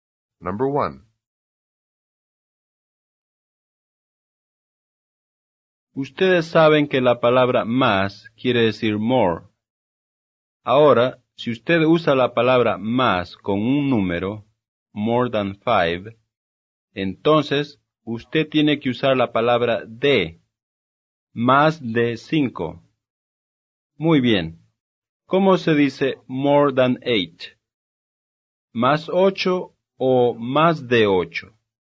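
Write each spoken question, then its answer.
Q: Muy bien. ¿Cómo se dice more than 8? ¿Más 8 o más de 8?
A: Más de 8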